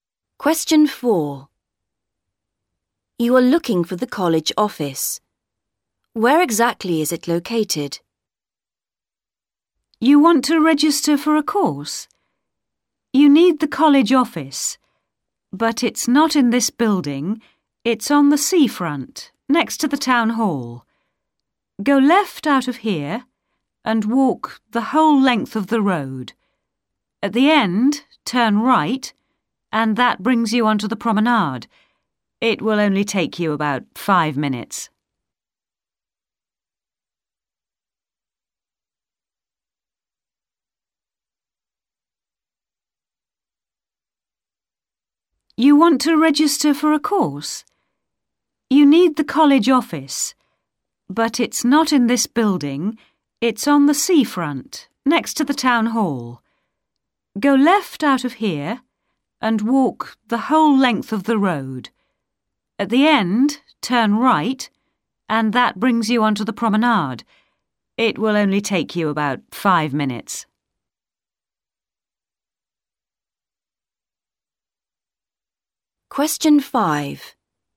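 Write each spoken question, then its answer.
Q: Where exactly is it located?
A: On the seafront, next to the town hall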